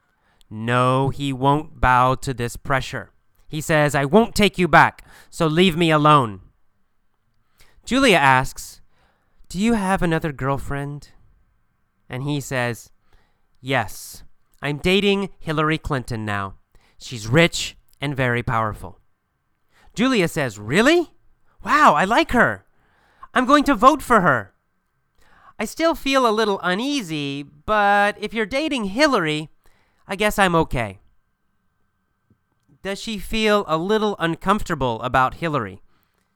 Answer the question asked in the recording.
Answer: Yes, that's right. She feels a little uneasy that he is dating Hillary.